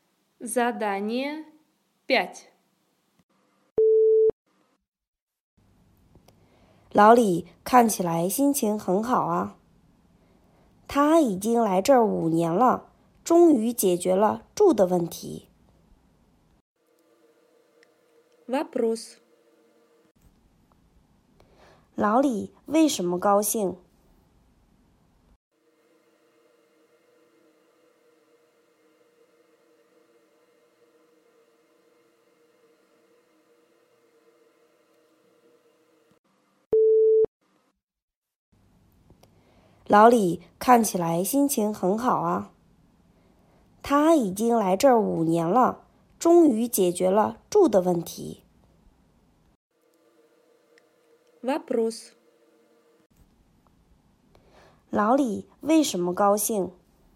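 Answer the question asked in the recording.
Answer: 终于解决了住的问题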